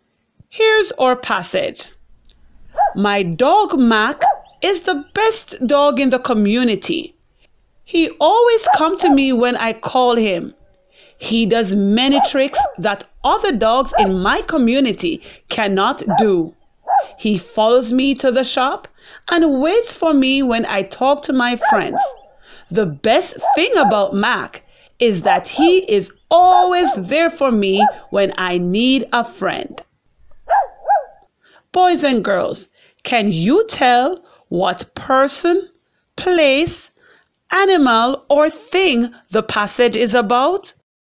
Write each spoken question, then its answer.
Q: Boys and girls, can you tell what person, place, animal, or thing the passage is about?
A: If you said it is about a dog named Mac, you are correct.